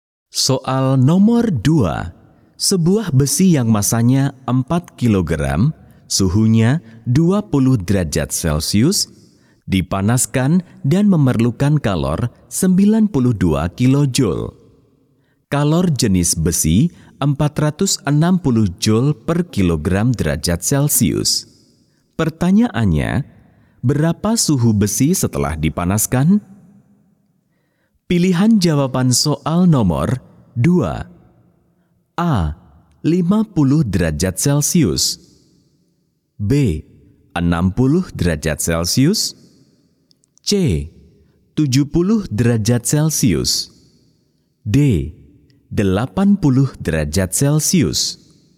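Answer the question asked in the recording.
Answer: C: 70 derajat Celcius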